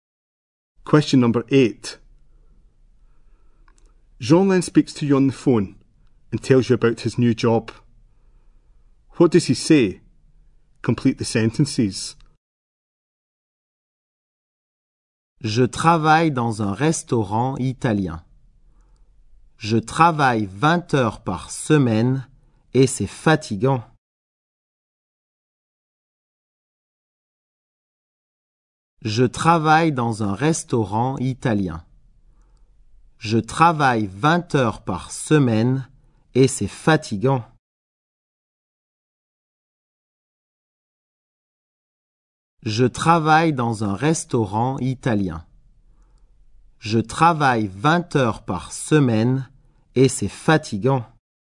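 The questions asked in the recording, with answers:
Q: What does he say?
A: He works in an Italian restaurant, 20 hours a week, and it's tiring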